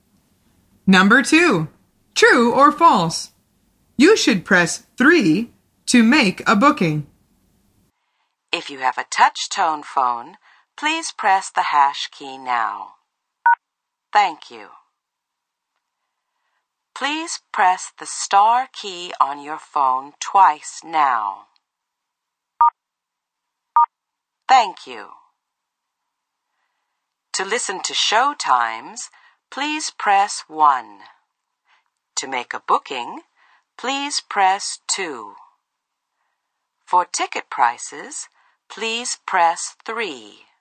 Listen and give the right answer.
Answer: The answer is false. The woman says, to make a booking, please press 2.